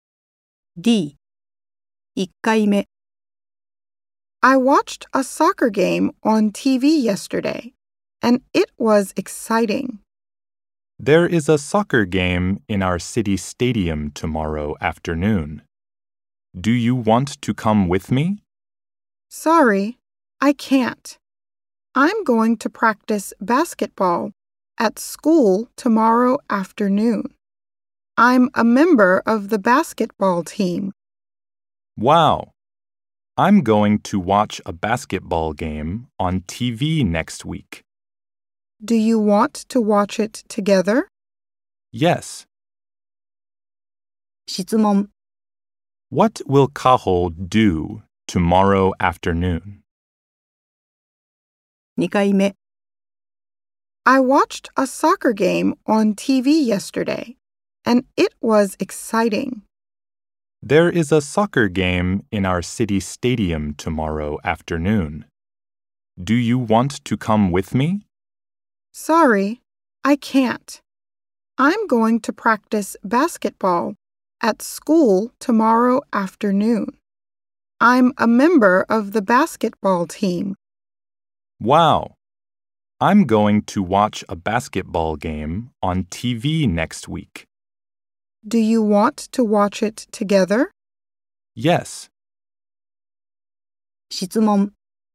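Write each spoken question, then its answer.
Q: What will Cahill do tomorrow afternoon?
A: Practice basketball at school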